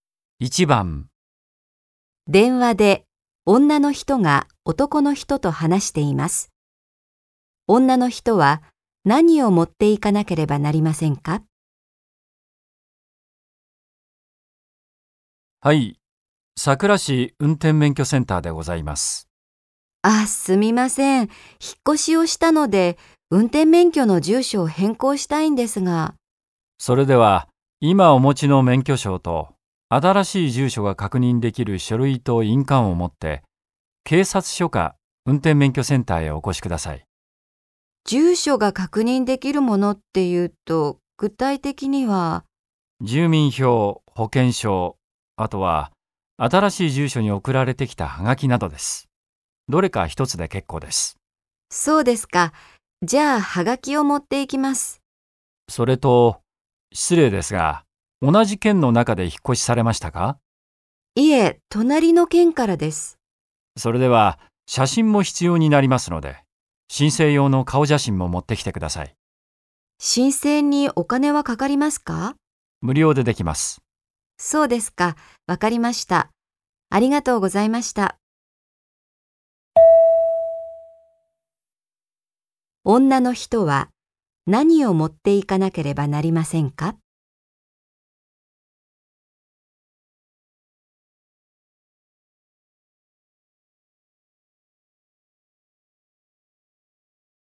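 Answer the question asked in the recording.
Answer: 免許証、ハガキ、印鑑、顔写真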